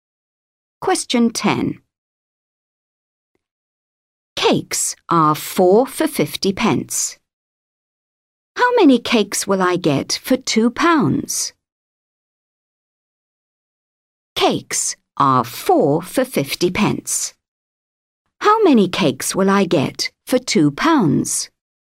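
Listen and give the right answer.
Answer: 16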